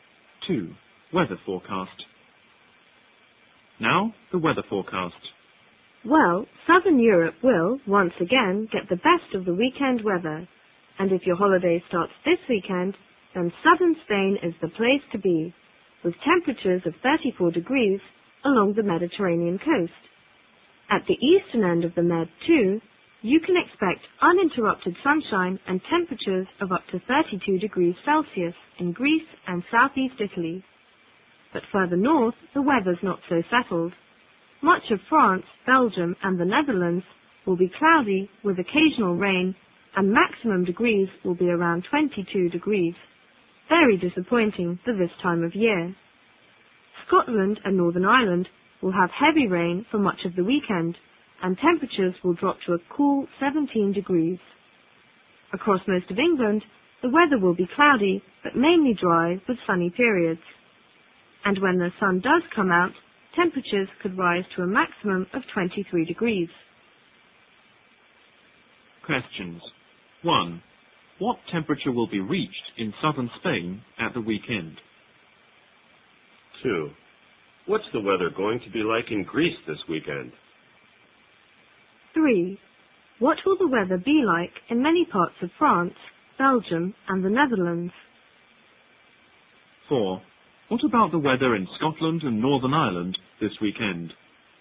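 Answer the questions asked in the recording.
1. 34 degrees
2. Sunshine all the time, up to 32 degrees Celsius
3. Cloudy with some rain, highs around 22 degrees
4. Heavy rain, with temperatures down to 17 degrees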